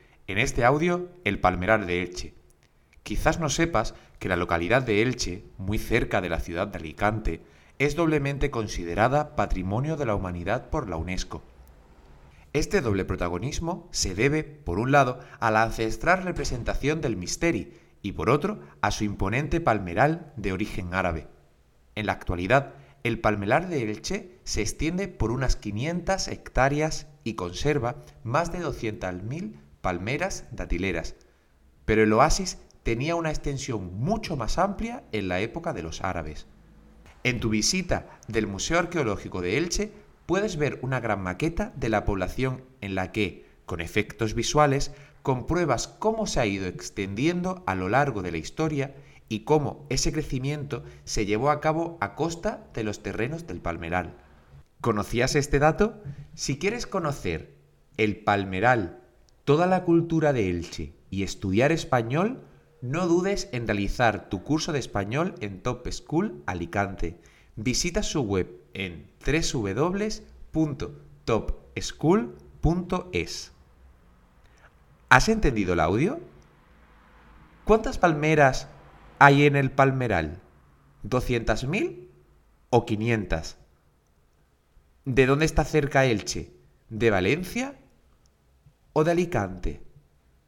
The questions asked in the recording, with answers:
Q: ¿Cuántas palmeras hay en el palmeral? ¿200.000 o 500?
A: Son 200.000 palmeras

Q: ¿De dónde está cerca Elche? ¿De Valencia o de Alicante?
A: está muy cerca de la ciudad de Alicante.